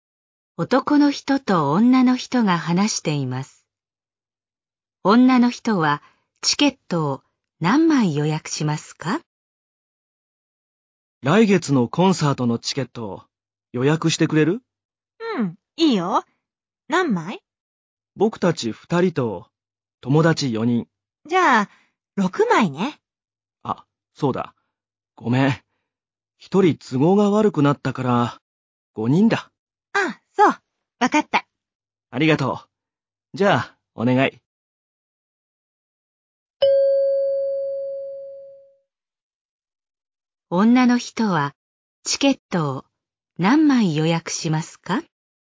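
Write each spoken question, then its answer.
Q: 女の人はチケットを何枚予約しますか?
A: 5枚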